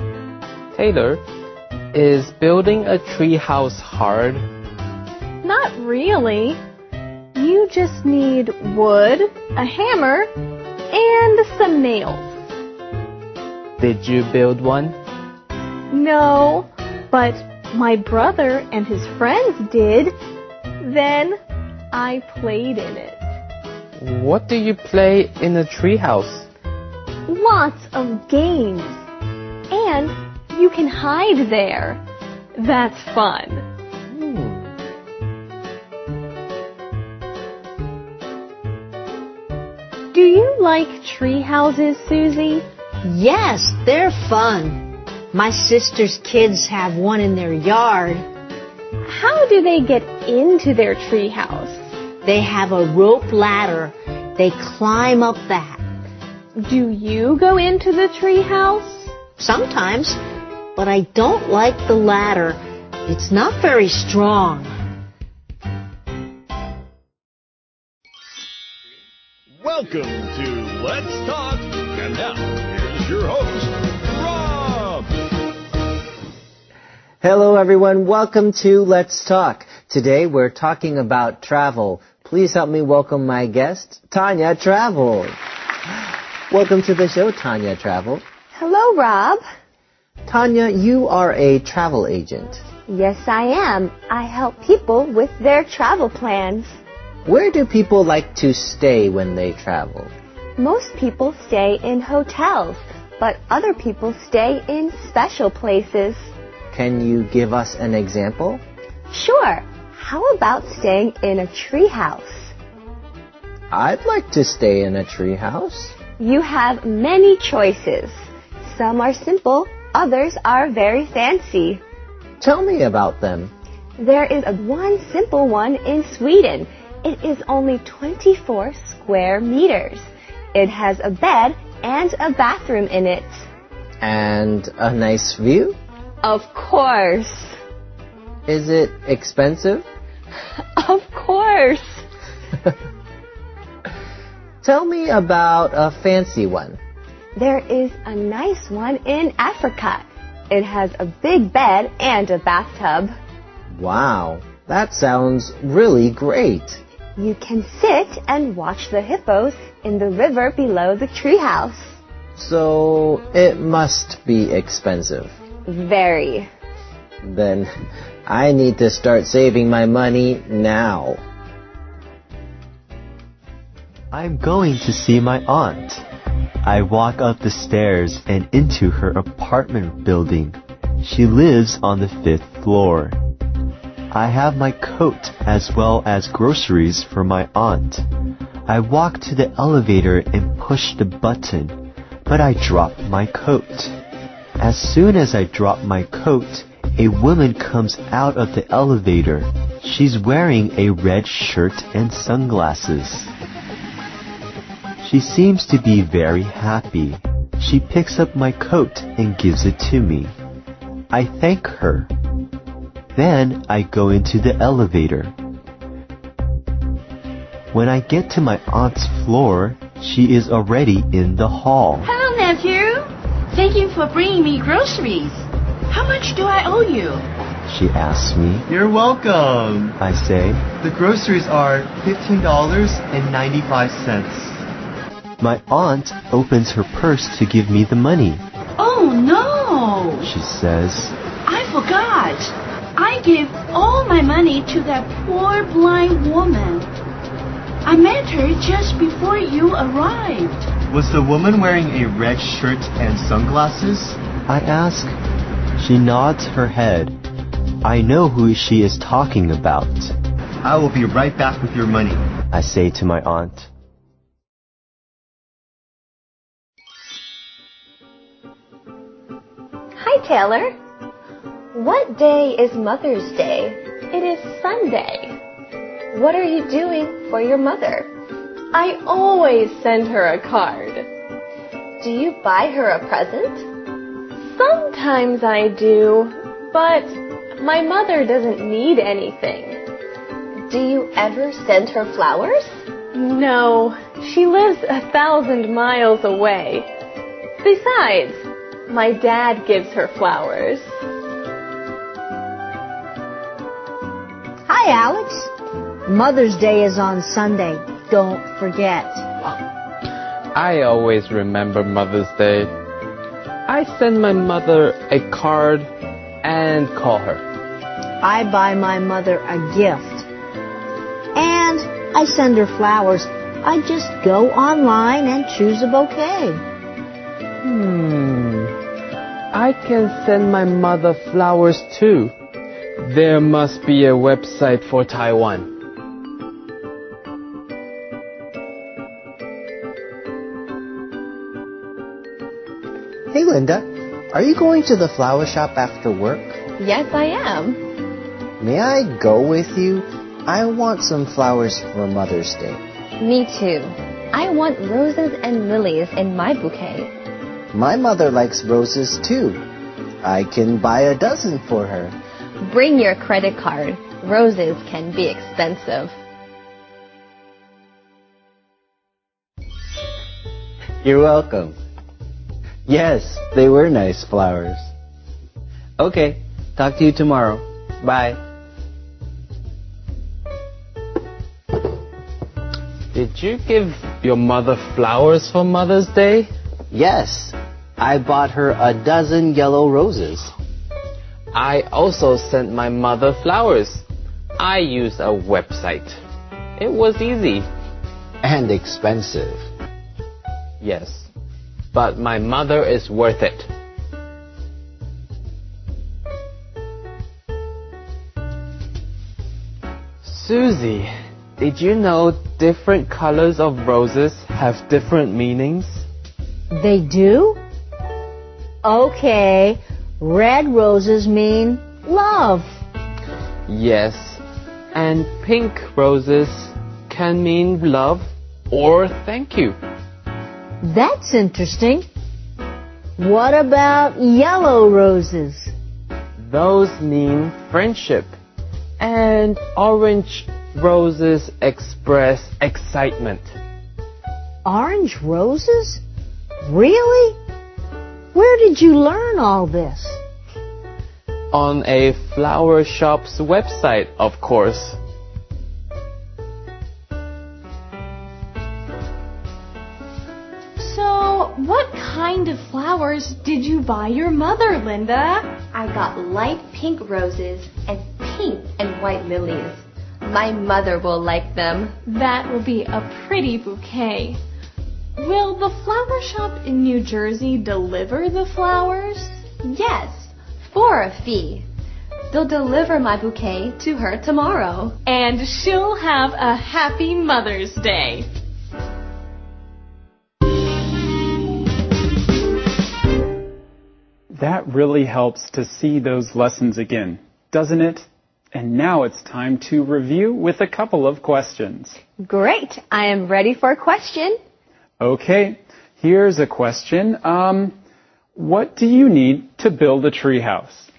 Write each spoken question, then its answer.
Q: What do you need to build a treehouse?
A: you're right about wood. You also need nails and a hammer.